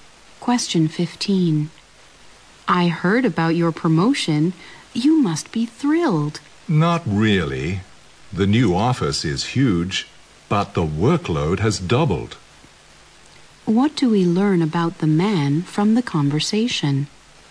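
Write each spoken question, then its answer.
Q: What do we learn about the man from the conversation?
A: He isn't happy about his promotion because his workload has doubled.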